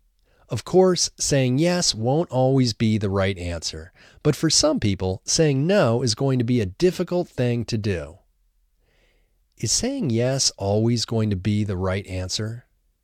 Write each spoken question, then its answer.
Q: Is saying yes always going to be the right answer?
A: No, of course, saying yes won't always be the right answer.